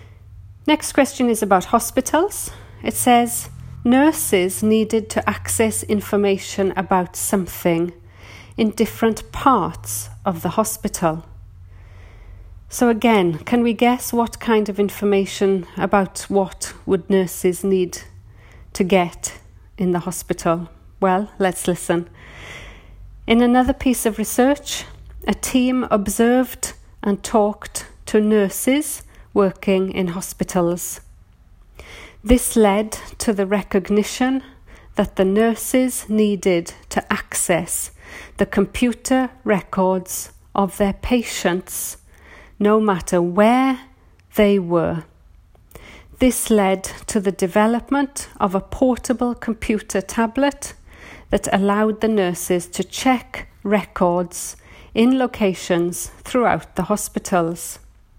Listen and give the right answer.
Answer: So the answer is patients.